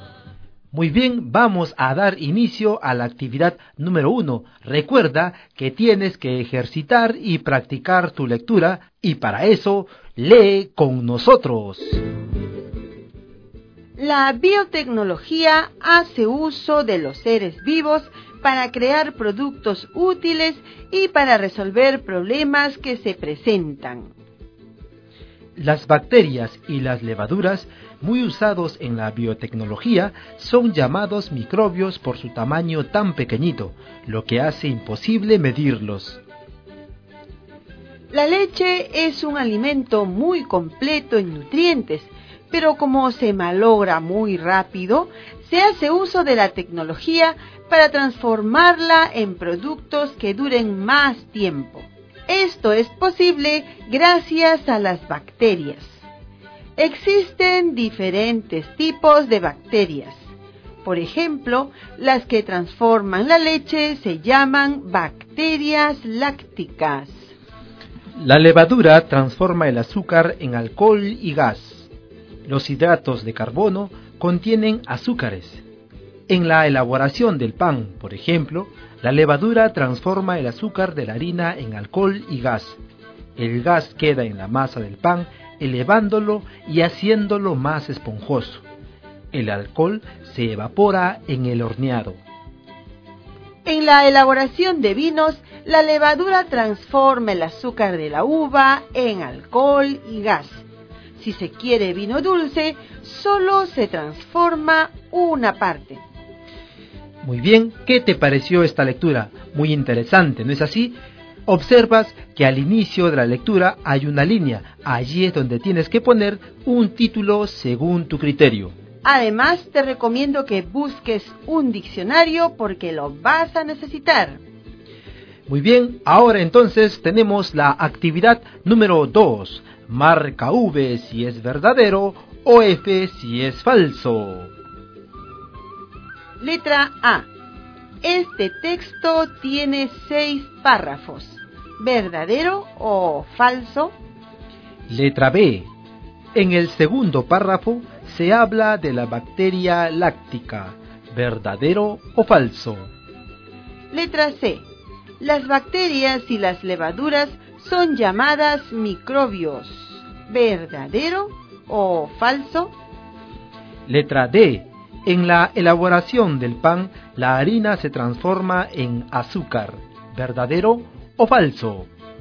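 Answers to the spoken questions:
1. Verdadero
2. Falso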